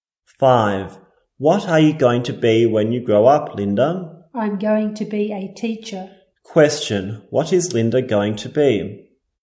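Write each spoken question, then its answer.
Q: What is Linda going to be?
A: A teacher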